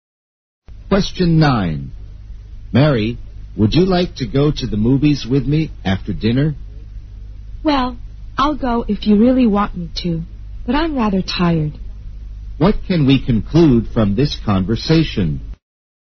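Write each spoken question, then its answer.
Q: What can we conclude from this conversation?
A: Mary is tired and doesn't really want to go to the movies.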